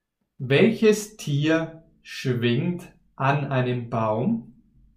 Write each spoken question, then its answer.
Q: Welches Tier schwingt an einem Baum?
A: Ein Affe.